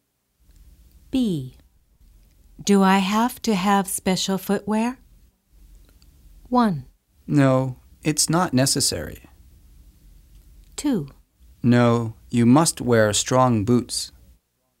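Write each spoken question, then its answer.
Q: Do I have to have special footwear?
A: 1: No, it's not necessary.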